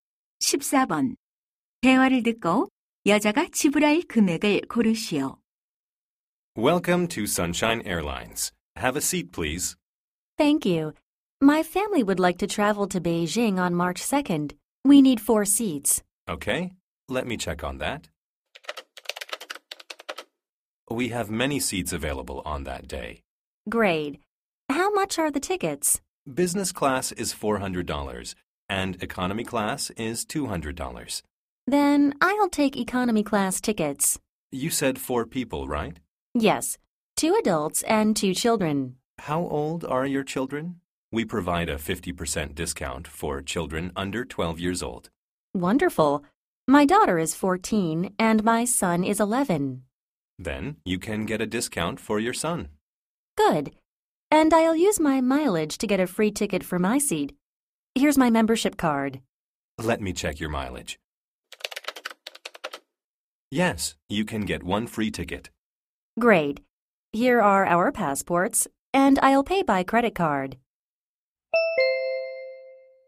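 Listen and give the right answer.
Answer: 500달러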